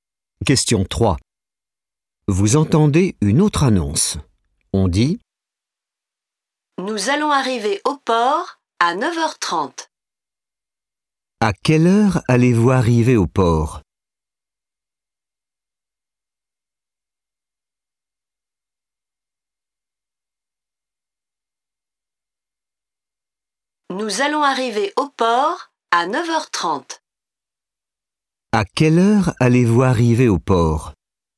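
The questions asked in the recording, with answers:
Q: À quelle heure allez-vous arriver au port ?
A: À 9h30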